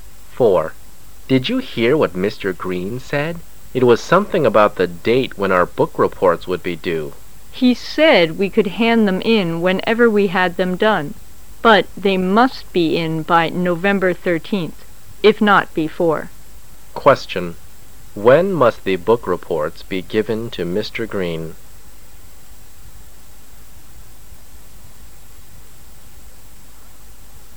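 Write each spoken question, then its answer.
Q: When must the book reports be given to Mr. Green?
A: By November 13th

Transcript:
[解析] M: Did you hear what Mr. Green said? It was something about the date when our book-reports would be due. W: He said we could hand them in whenever we had them done, but they must be in by November 13, if not before. Q: When must the book-reports be given to Mr. Green ?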